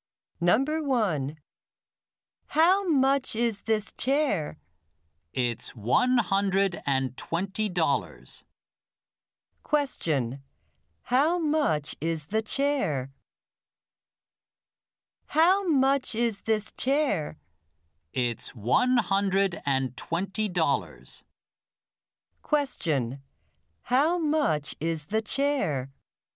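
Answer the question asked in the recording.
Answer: $120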